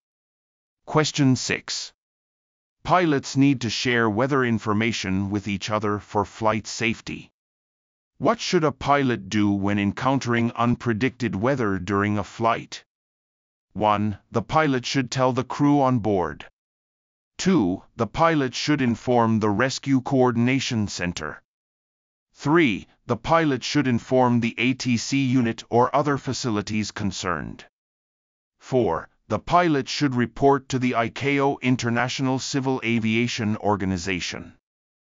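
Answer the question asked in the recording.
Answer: 3: The pilot should inform the ATC unit or other facilities concerned.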